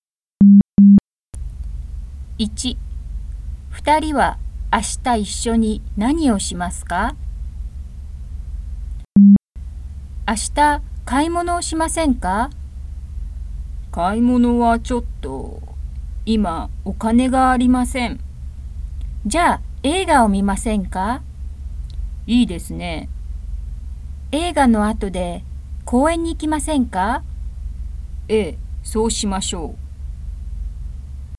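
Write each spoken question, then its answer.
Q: 2人は明日一緒に何をしますか?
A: 映画を見て、その後公園に行きます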